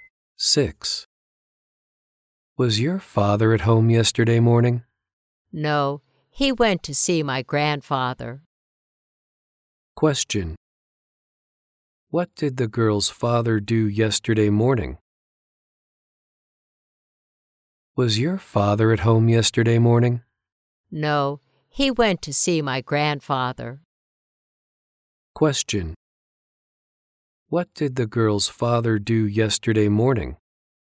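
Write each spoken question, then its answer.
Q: What did the girl's father do yesterday morning?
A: He went to see her grandfather.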